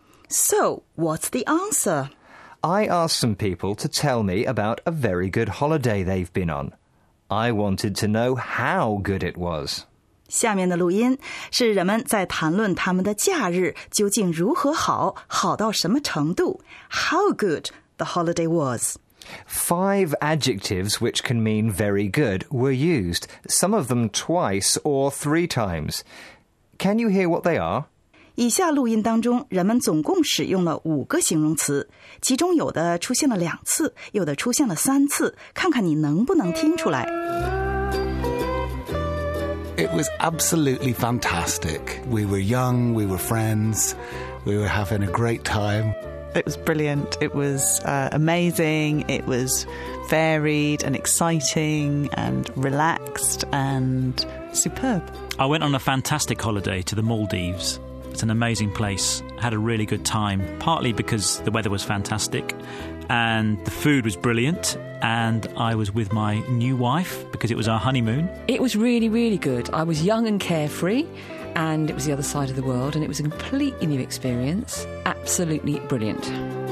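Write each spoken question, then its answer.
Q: Can you hear what they are?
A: fantastic, great, brilliant, amazing, superb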